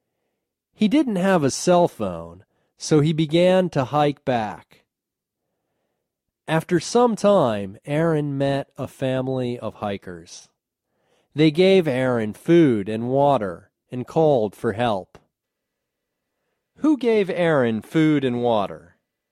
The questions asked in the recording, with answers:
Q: Who gave Aaron food and water?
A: A family of hikers gave Aaron food and water.